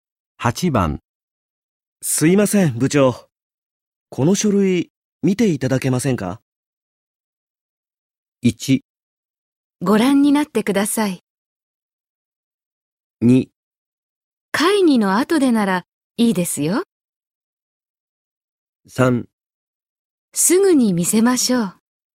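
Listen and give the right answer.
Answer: 2: 会議の後でならいいですよ。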